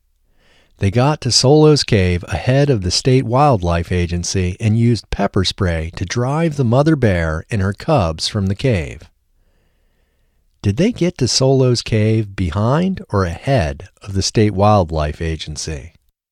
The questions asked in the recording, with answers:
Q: Did they get to Solo's cave behind or ahead of the state wildlife agency?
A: They got to Solo's cave ahead of the state wildlife agency.